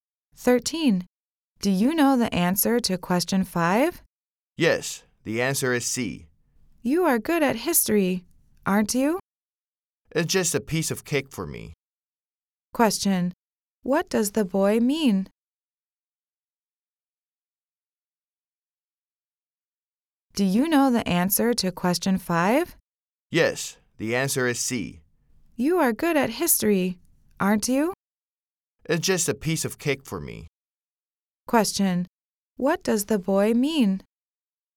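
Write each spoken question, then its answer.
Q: Question. What does the boy mean?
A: History questions are very easy for him.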